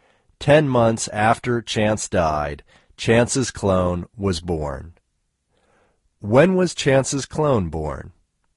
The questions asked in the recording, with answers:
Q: When was Chance's clone born?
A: Chance's clone was born 10 months after Chance died.